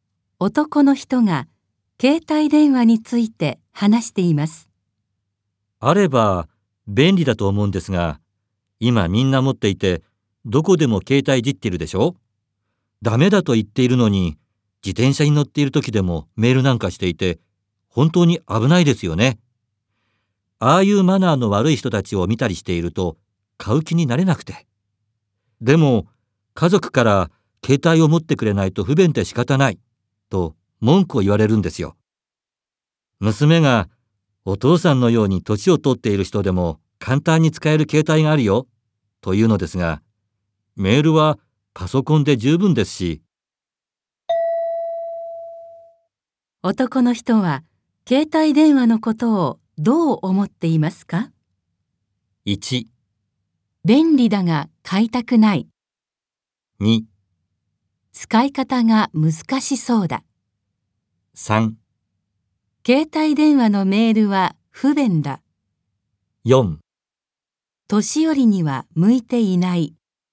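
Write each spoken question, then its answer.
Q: 男の人は携帯電話のことをどう思っていますか?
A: 1: 便利だが買いたくない。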